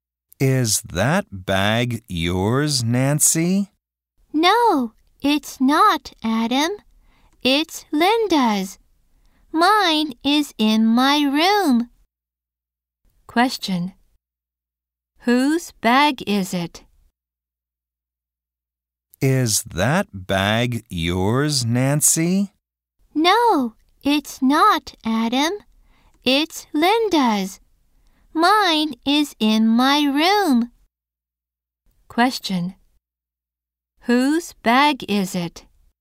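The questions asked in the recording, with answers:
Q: Whose bag is it?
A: Linda's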